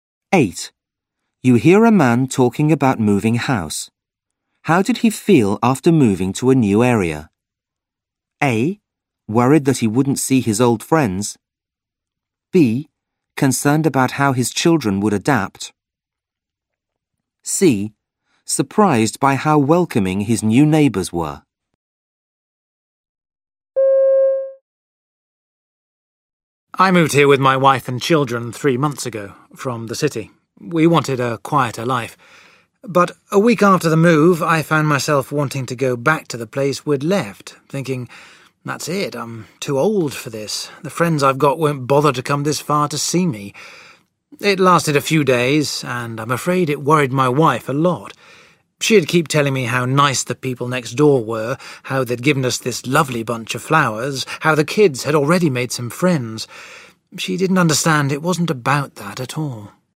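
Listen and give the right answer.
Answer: A: Worried that he wouldn't see his old friends.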